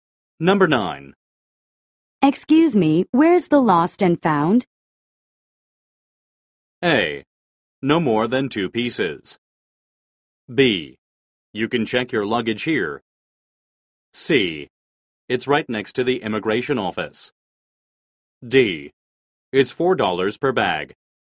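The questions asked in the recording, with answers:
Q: Excuse me, where's the lost and found?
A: C: It's right next to the immigration office.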